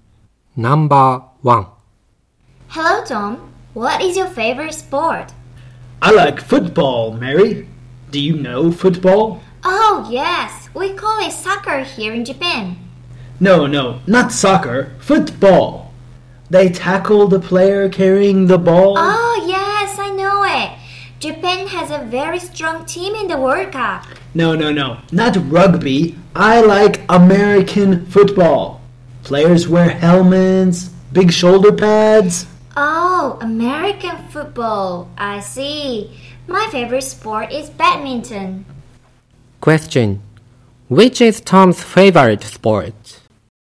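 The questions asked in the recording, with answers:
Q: Which is Tom's favorite sport?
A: American football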